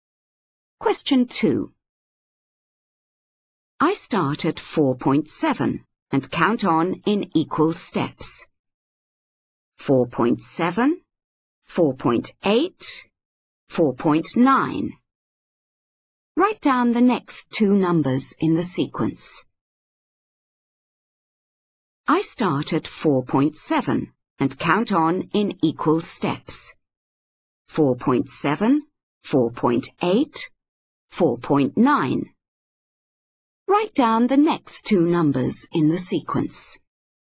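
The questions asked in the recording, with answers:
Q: Write down the next two numbers in the sequence.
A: 5.0, 5.1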